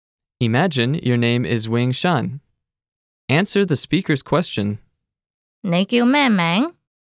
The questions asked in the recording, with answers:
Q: 你叫咩名?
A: 我叫永山。